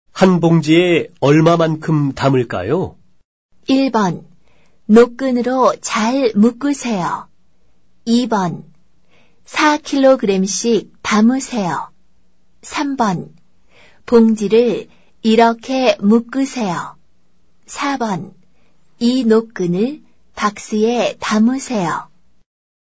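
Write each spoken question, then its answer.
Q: 한 봉지에 얼마만큼 담을까요?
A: 2: 4kg씩 담으세요.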